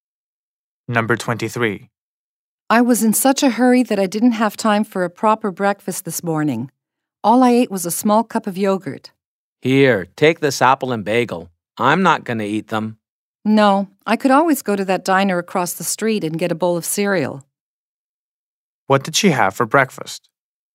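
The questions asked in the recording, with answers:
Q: What did she have for breakfast?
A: A small cup of yogurt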